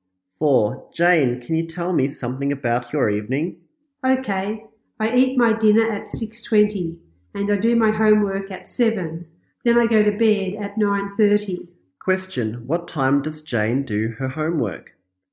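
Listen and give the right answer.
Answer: At 7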